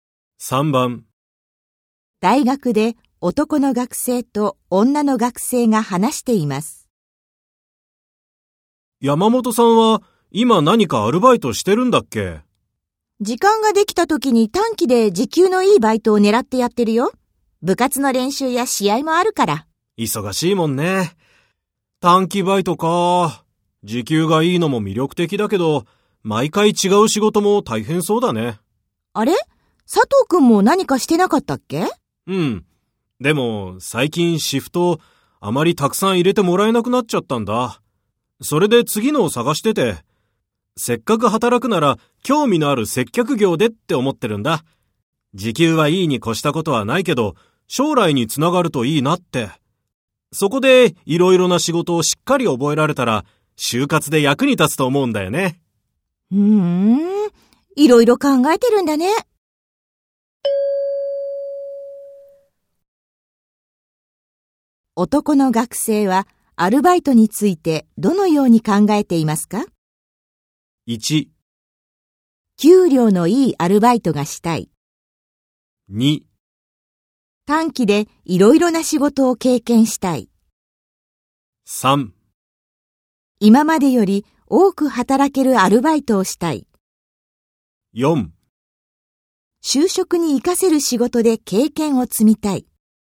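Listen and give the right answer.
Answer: 4: 就職に活かせる仕事で経験を積みたい。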